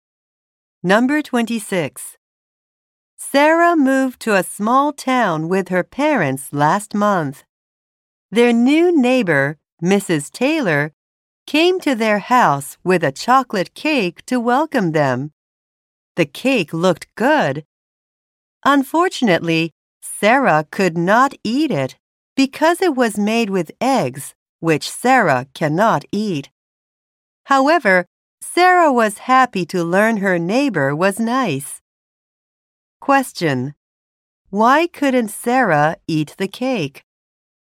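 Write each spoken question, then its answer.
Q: Why couldn't Sarah eat the cake?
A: It was made with eggs, which she cannot eat.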